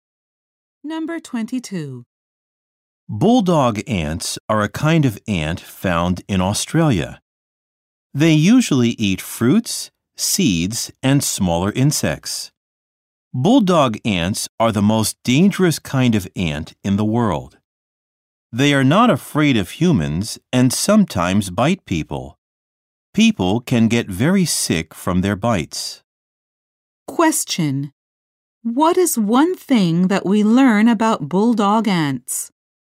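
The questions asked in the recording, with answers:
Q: What is one thing that we learn about bulldog ants?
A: They are the most dangerous ants in the world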